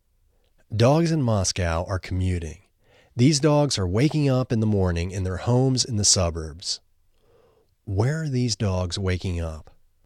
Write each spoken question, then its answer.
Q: Where are these dogs waking up?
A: These dogs are waking up in their homes in the suburbs.